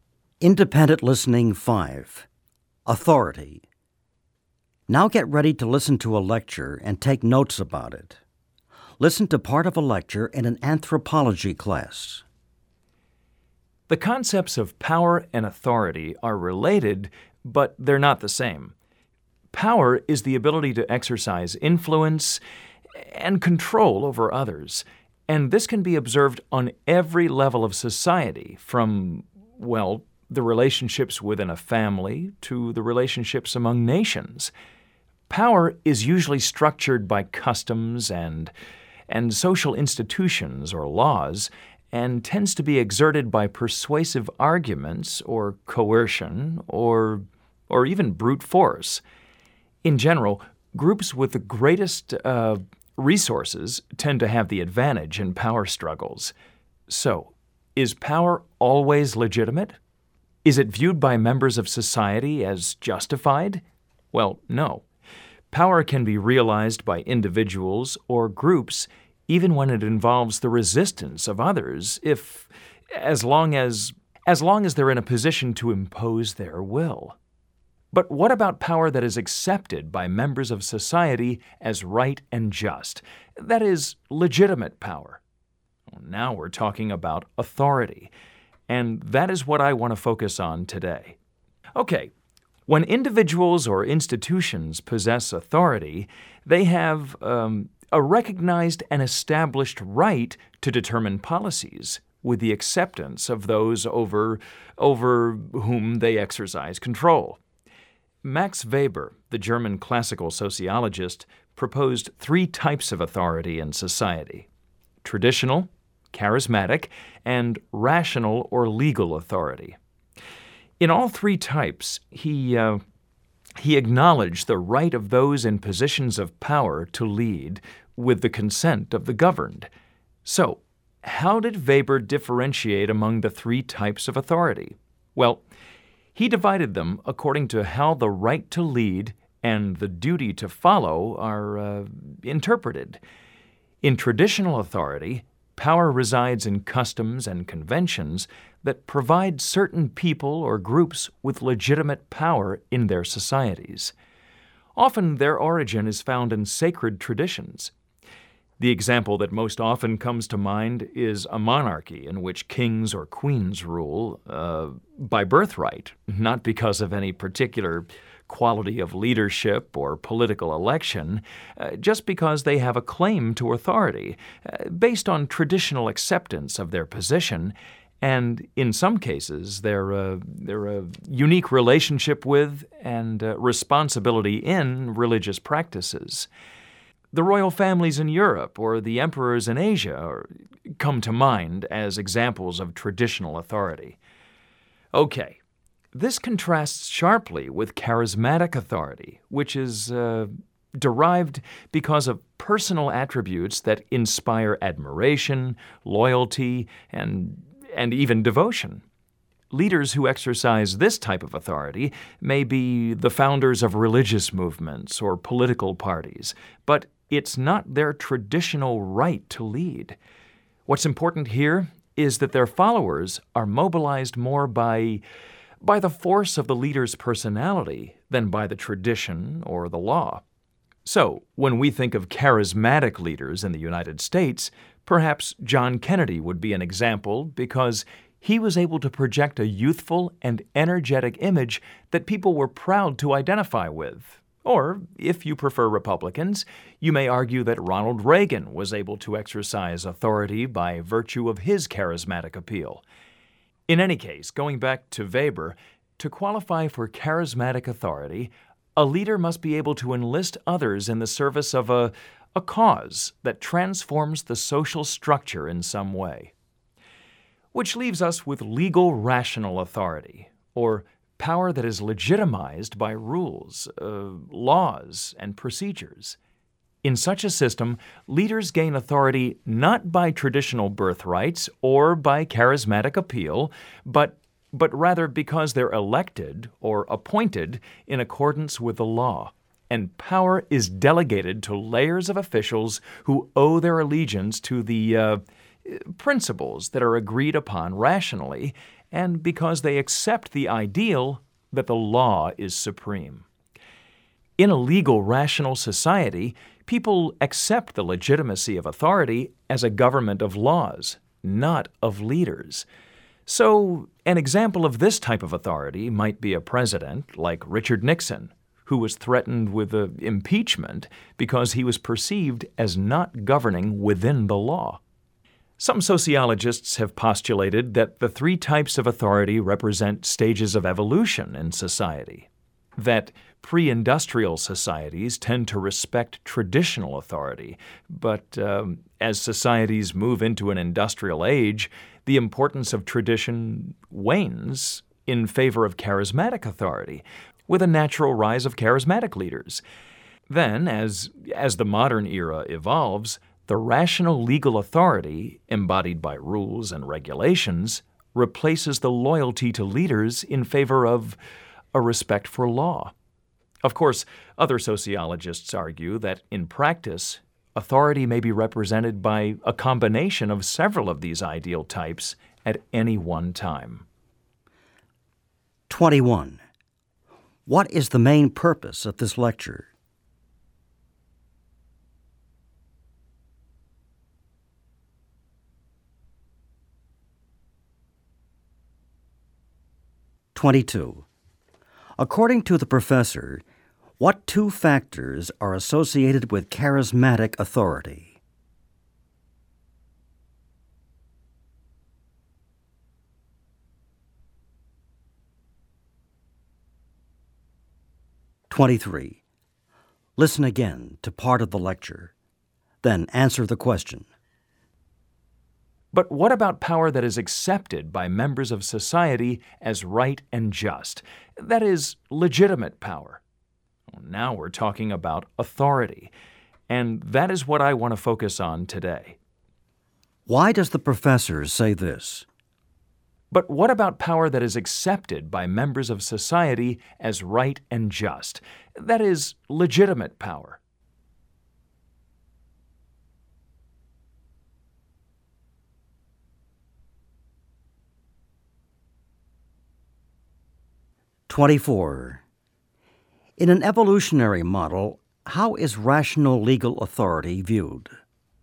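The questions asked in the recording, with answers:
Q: What is the main purpose of this lecture?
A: To explain Weber's three types of authority: traditional, charismatic, and rational-legal

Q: In an evolutionary model, how is rational legal authority viewed?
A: As the last stage, in the modern era, replacing loyalty to leaders with respect for law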